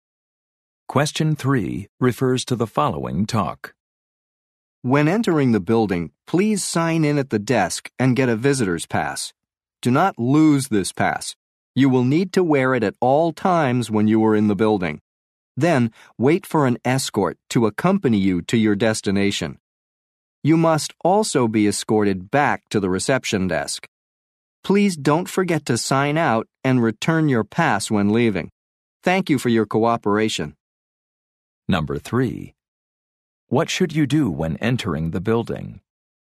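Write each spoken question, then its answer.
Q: What should you do when entering the building?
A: Sign in at the desk and get a visitor's pass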